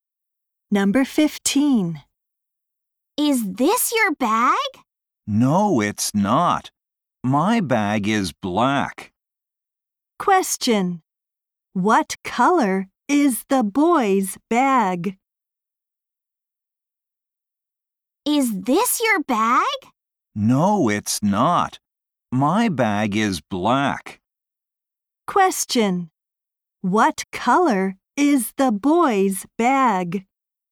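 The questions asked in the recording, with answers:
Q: What color is the boy's bag?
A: Black.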